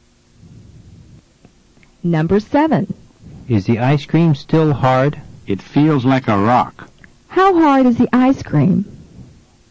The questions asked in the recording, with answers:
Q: How hard is the ice cream?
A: It's as hard as a rock.